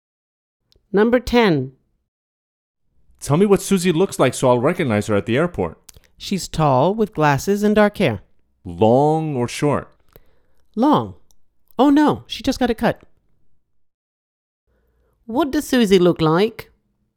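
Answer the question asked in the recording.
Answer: Tall, with glasses and short dark hair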